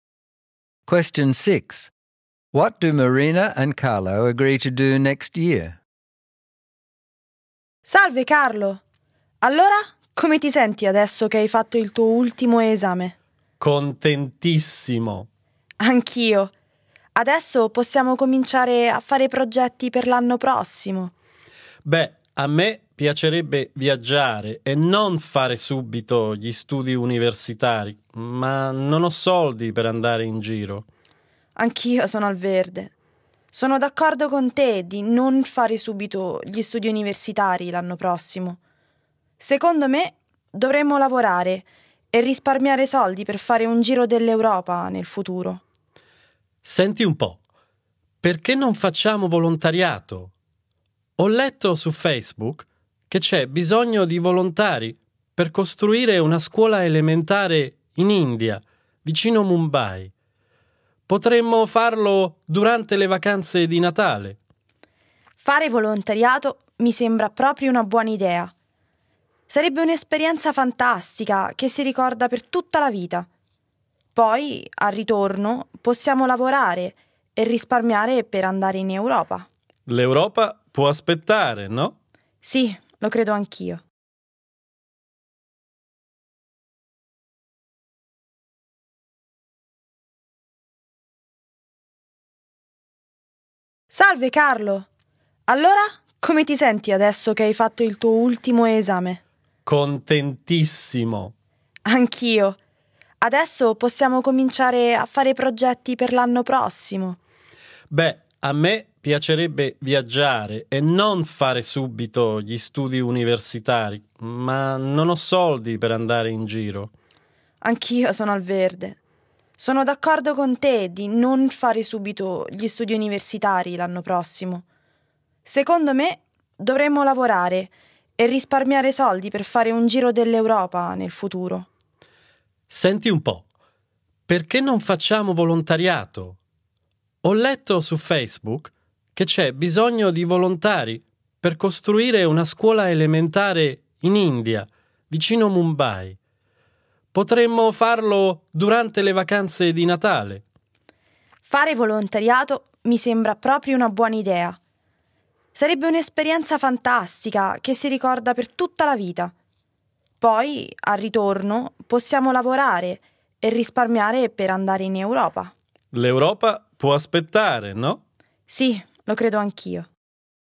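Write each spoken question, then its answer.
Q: What do Marina and Carlo agree to do next year?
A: They agree to put off university and to volunteer building a primary school near Mumbai in India during the Christmas holidays. Afterwards they will work and save money for a trip to Europe.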